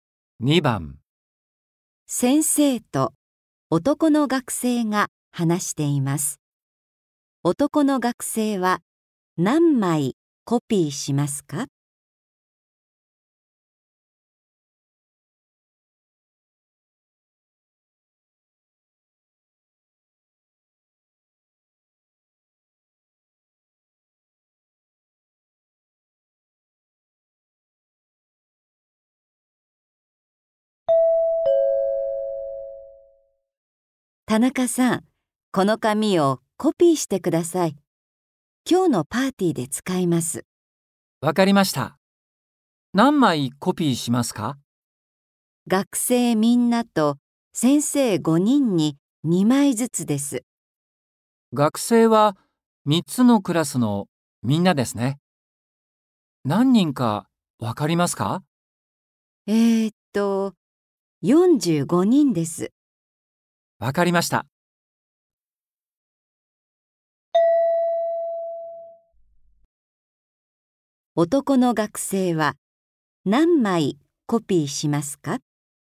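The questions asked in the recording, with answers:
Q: 男の学生は何枚コピーしますか?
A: 100枚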